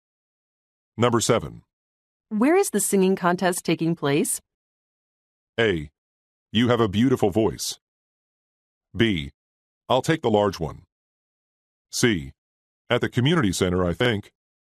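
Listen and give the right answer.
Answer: C: At the community center, I think.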